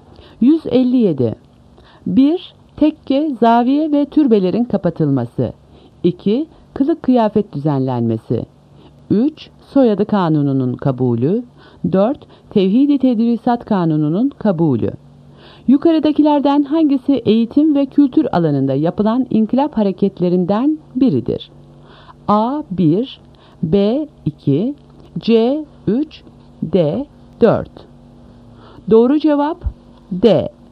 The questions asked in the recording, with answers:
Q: Yukarıdakilerden hangisi eğitim ve kültür alanında yapılan inkılap hareketlerinden biridir?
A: Doğru cevap D. 4.